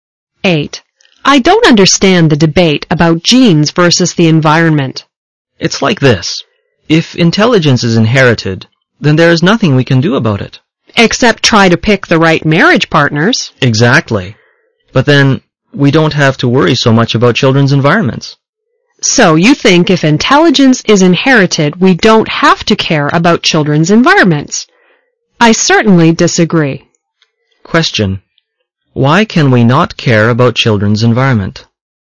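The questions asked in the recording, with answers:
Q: Why can we not care about children's environment?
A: Because if intelligence is inherited, there is nothing we can do about it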